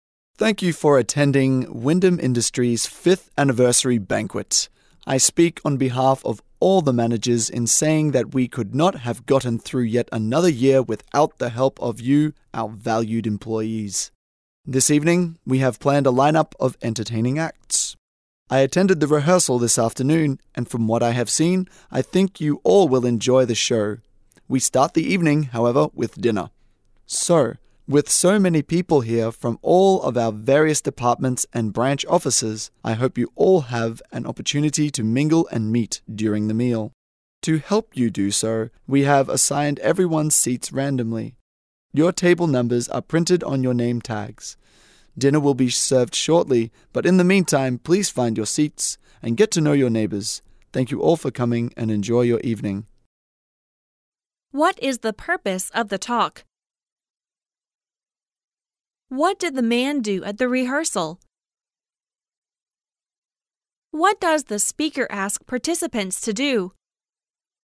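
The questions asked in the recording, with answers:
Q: What is the purpose of the talk?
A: To welcome employees to the company's 5th anniversary banquet

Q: What does the speaker ask participants to do?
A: Find their seats and get to know their neighbors

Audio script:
I speak on behalf of all the managers m saying that we could not have gotten through yet another year without the help of you, our valued employees. This evening we have planned a lineup of entertaining acts. I attended the rehearsal this afternoon and from what I have seen, I think you all will enjoy the show. We start the evening, however, with dinner. So, with so many people here from all of our various departments and branch offices, I hope you all have an opportunity to mingle and meet during the meal. To help you do so, we have assigned everyone seats randomly. Your table numbers are printed on your name tags. Dinner will be served shortly, but in the meantime, please find your seats and get to know your neighbors. 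Thank you all for coming and enjoy your evening.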